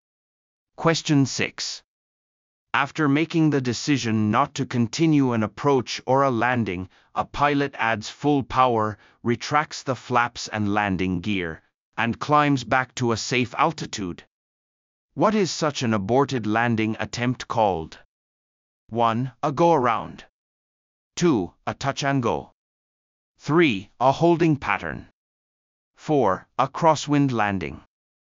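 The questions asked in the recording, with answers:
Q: What is such an aborted landing attempt called?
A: 1: A go-around.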